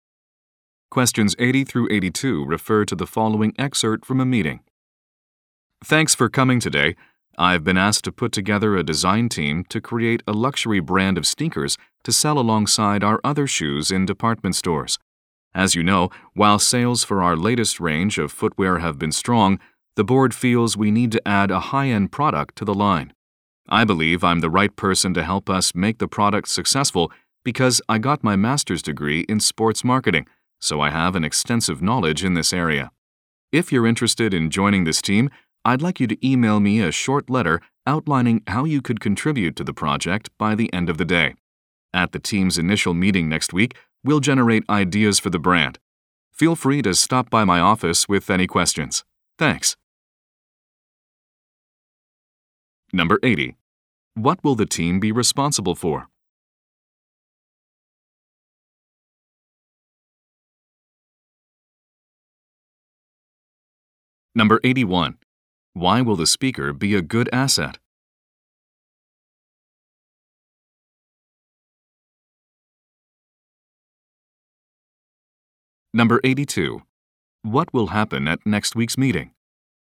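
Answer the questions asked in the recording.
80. Creating a luxury brand of sneakers
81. He has a master's degree in sports marketing
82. The team will generate ideas for the brand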